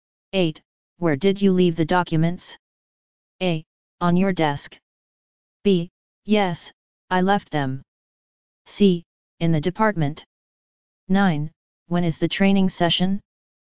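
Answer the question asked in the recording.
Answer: A: On your desk.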